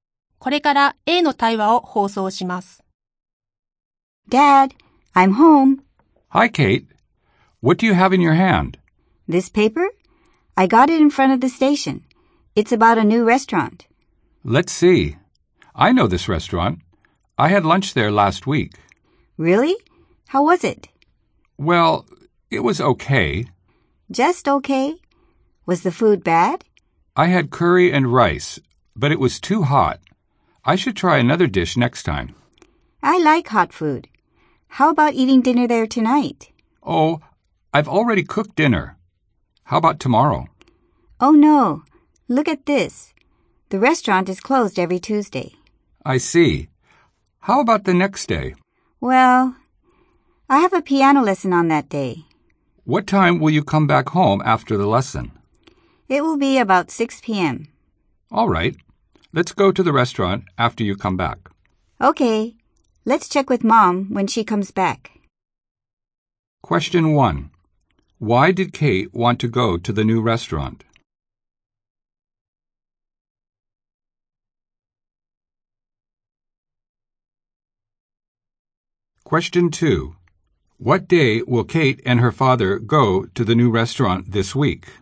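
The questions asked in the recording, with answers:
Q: What day will Kate and her father go to the new restaurant this week?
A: Wednesday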